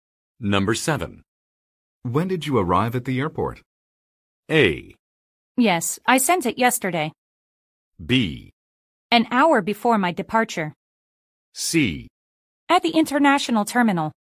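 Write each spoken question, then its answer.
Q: When did you arrive at the airport?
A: B: An hour before my departure.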